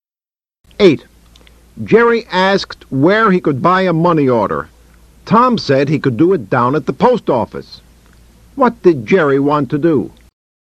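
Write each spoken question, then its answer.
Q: What did Jerry want to do?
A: Buy a money order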